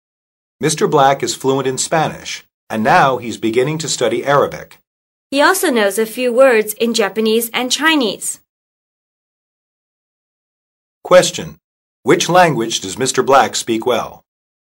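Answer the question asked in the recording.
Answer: Spanish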